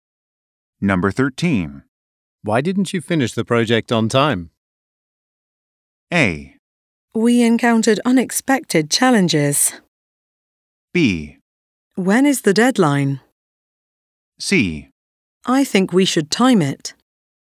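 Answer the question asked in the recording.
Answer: A: We encountered unexpected challenges.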